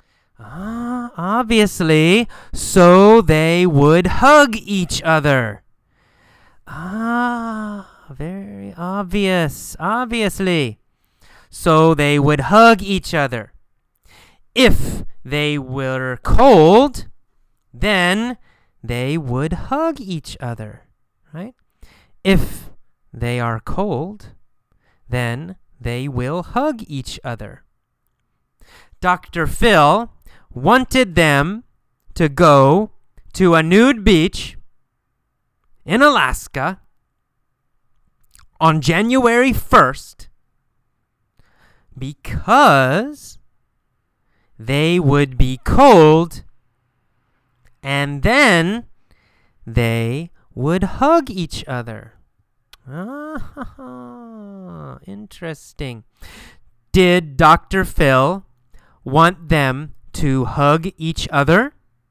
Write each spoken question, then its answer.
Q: Did Dr. Phil want them to hug each other?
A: Yes. Yes, he did.